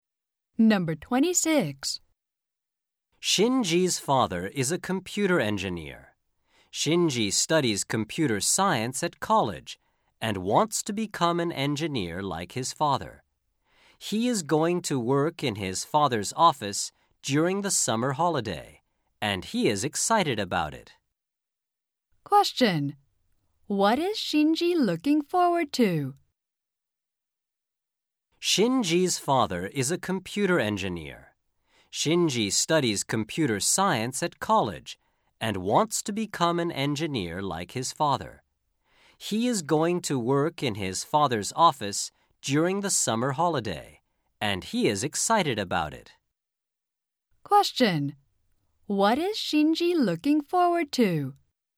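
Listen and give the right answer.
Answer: Working in his father's office during the summer holiday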